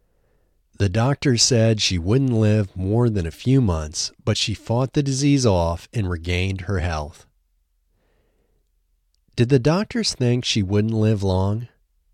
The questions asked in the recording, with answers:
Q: Did the doctors think she wouldn't live long?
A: Yes, the doctors thought she wouldn't live more than a few months.